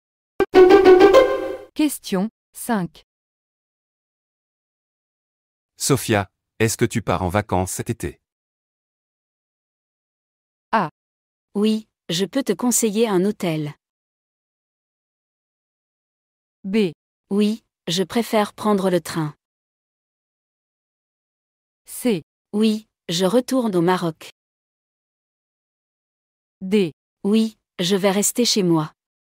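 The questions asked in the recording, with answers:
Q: Sophia, est-ce que tu pars en vacances cet été?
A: C: Oui, je retourne au Maroc.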